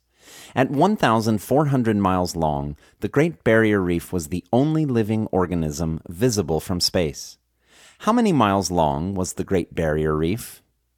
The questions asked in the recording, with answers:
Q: How many miles long was the Great Barrier Reef?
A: The Great Barrier Reef was 1,400 miles long.